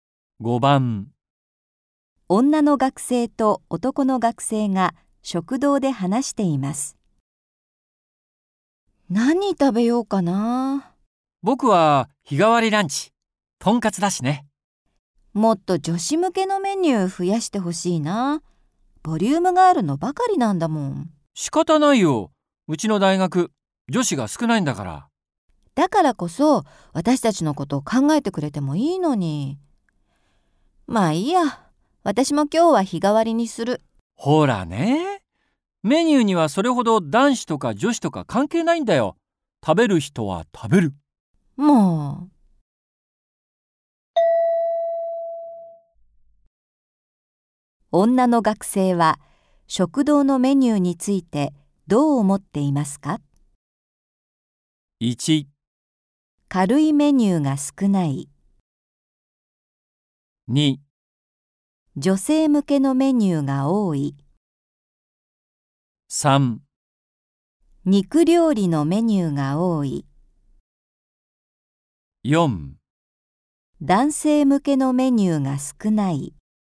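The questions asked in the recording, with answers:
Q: 女の学生は食堂のメニューについてどう思っていますか?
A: 1: 軽いメニューが少ない。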